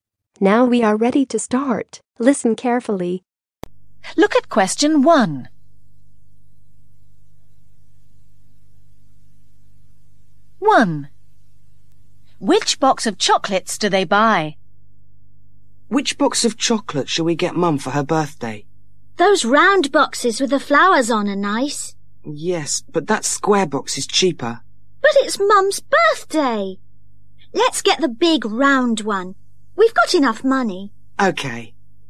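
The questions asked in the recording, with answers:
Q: Which box of chocolates do they buy?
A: The big round one (with flowers)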